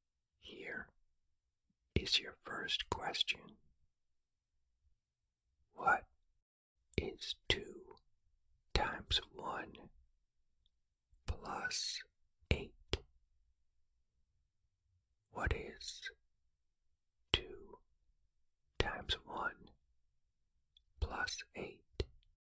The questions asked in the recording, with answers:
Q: What is 2 times 1 plus 8?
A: The answer is 10.